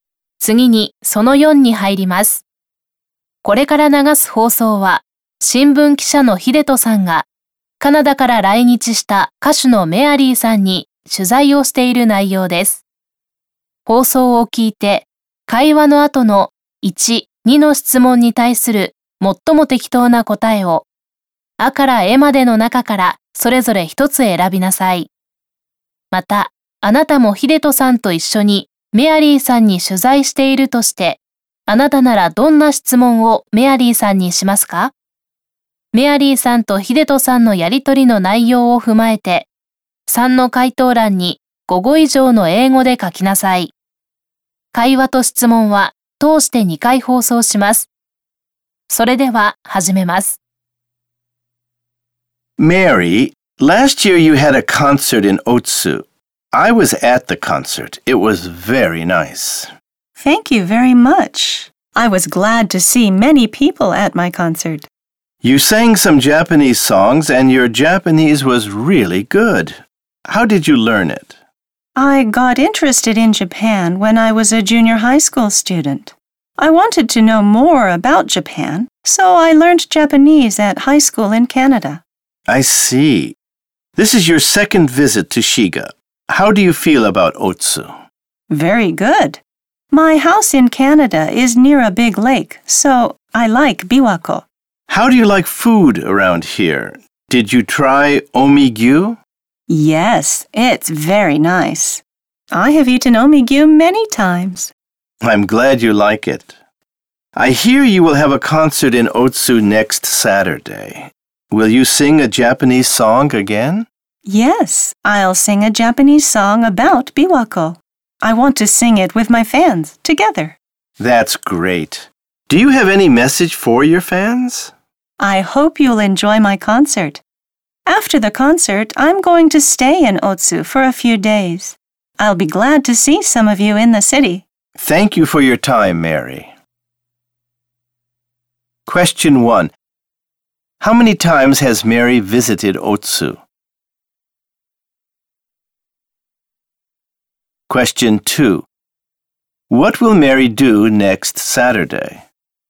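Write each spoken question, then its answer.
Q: How many times has Mary visited Otsu?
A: Twice

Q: What will Mary do next Saturday?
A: She will have a concert in Otsu and sing a Japanese song about Biwako with her fans.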